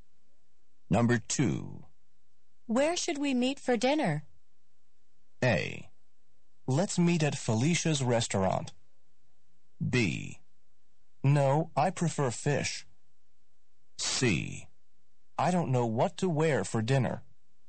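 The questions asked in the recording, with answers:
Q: Where should we meet for dinner?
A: A: Let's meet at Felicia's restaurant.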